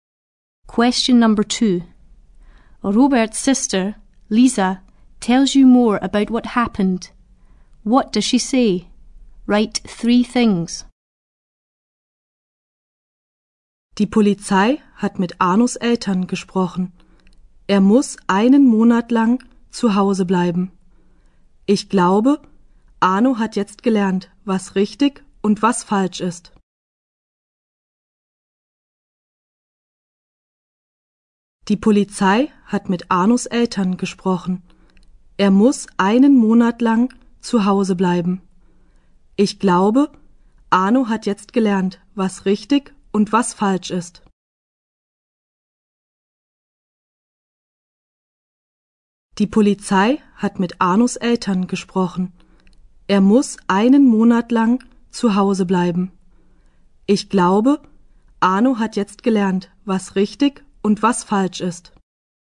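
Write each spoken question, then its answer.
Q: What does she say? Write three things.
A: The police spoke to Arno's parents; he must stay at home for a month; she thinks he has now learned right from wrong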